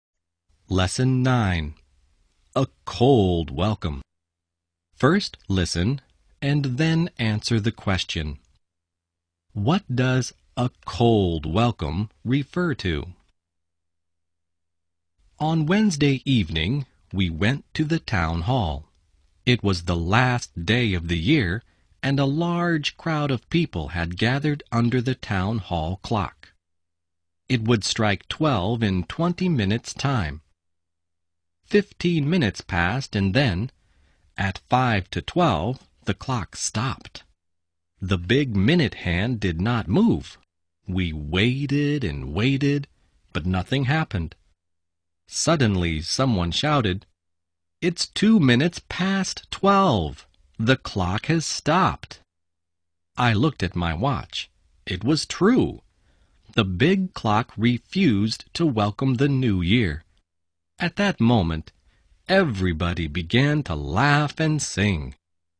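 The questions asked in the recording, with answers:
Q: What does a cold welcome refer to?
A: The town hall clock stopped and refused to welcome the new year.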